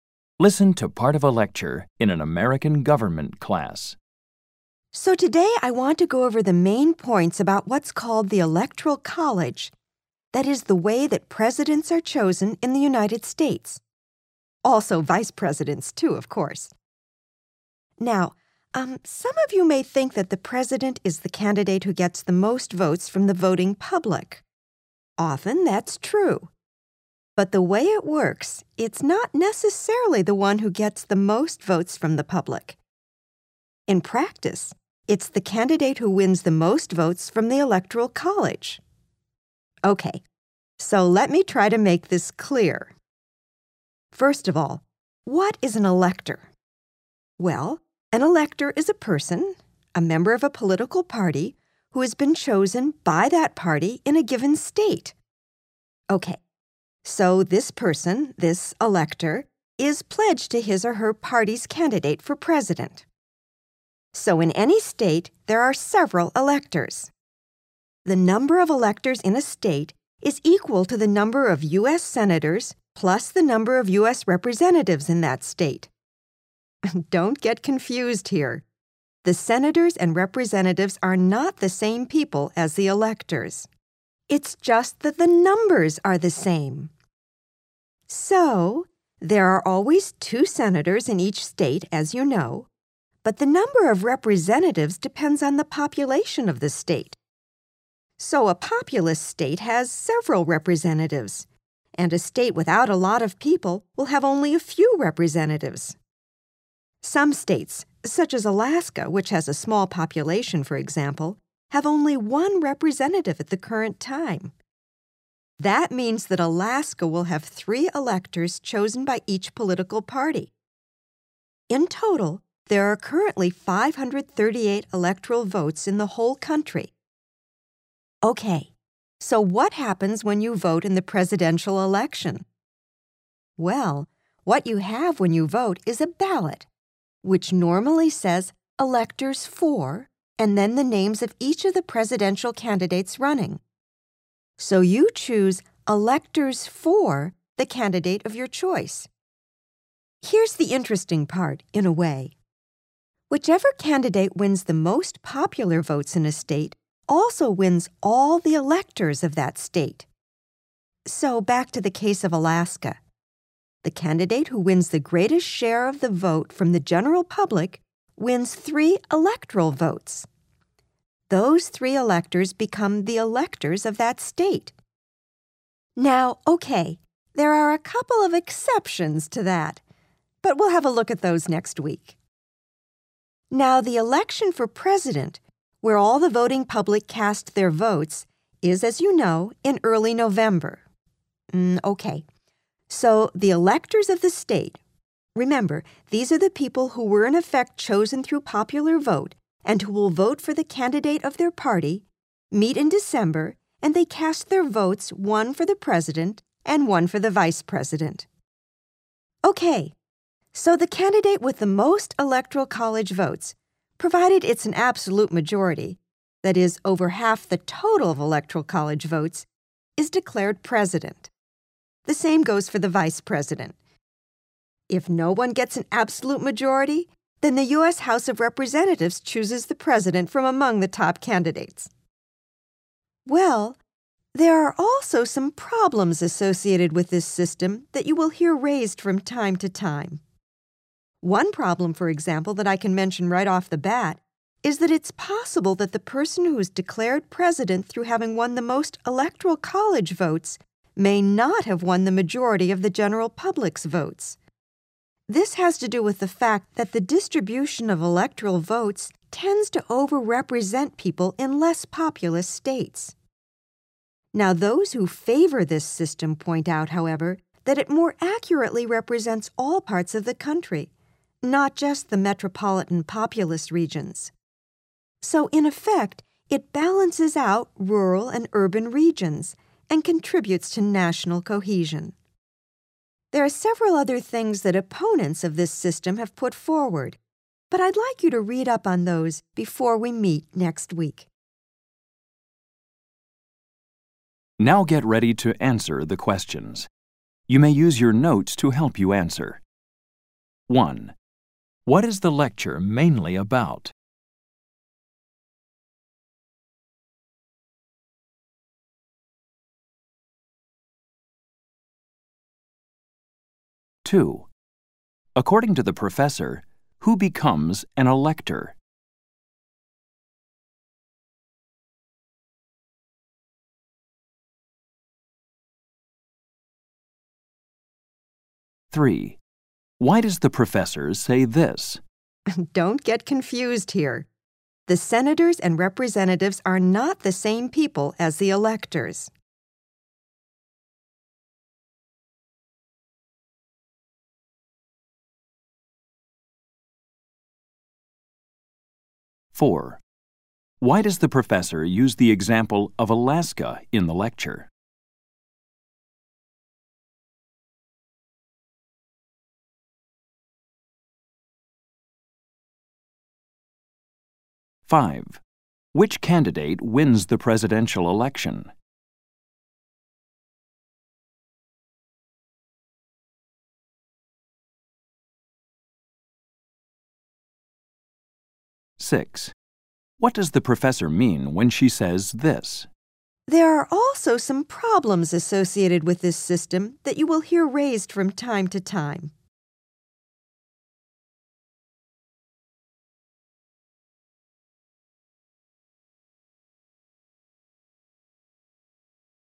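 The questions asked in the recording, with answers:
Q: What is the lecture mainly about?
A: How the Electoral College system chooses the U.S. president

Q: According to the professor, who becomes an elector?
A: A political party member chosen by that party in a state and pledged to its candidate

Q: Which candidate wins the presidential election?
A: The candidate with an absolute majority of Electoral College votes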